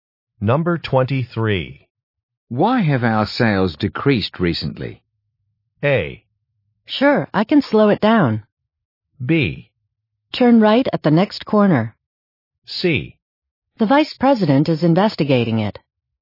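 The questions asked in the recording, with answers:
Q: Why have our sales decreased recently?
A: C: The vice president is investigating it.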